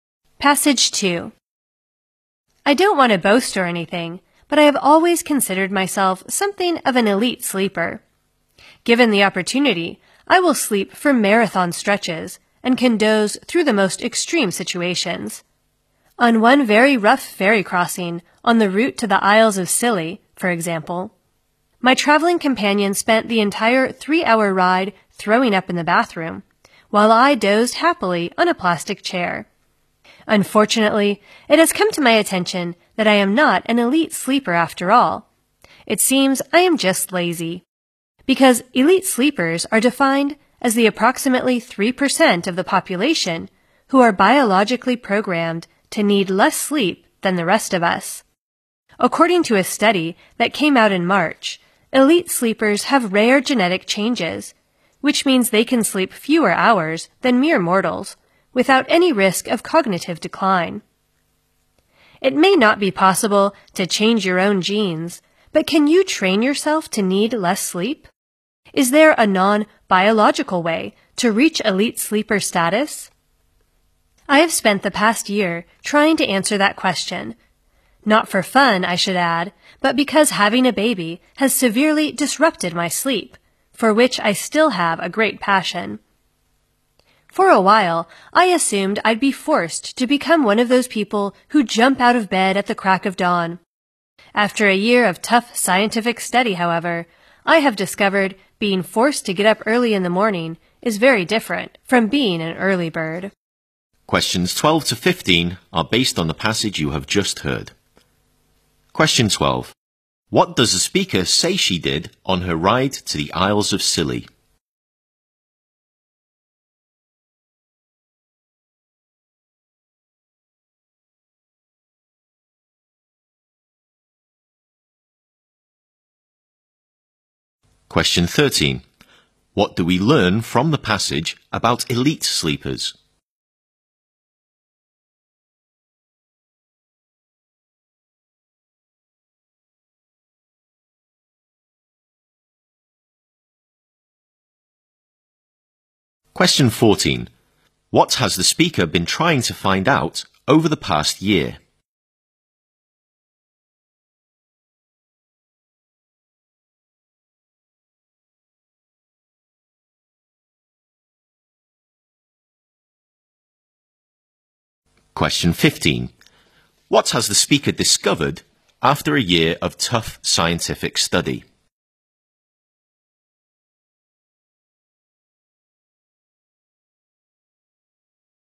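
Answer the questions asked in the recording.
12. She dozed happily on a plastic chair
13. They are genetically programmed to need less sleep without cognitive decline
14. Whether you can train yourself to need less sleep
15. Being forced to get up early is very different from being an early bird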